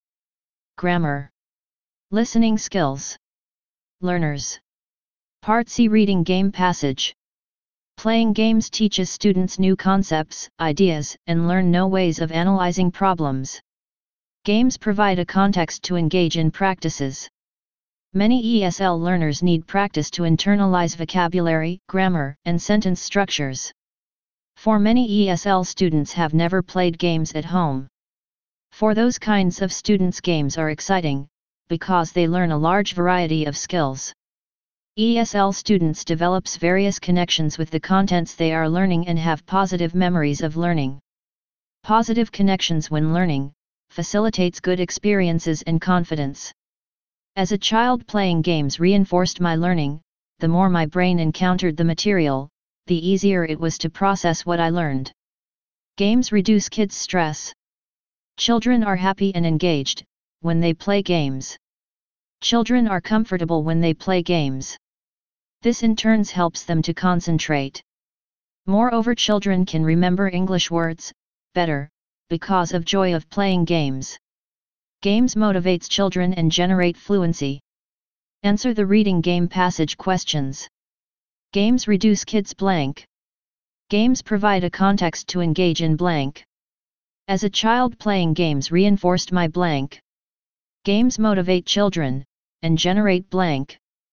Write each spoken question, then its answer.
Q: Games reduce kids' blank.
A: 1 Stress.

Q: Games provide a context to engage in blank.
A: 2 Practices.

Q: As a child, playing games reinforced my blank.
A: 3 Learning.

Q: Games motivate children and generate blank.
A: 4 Fluency.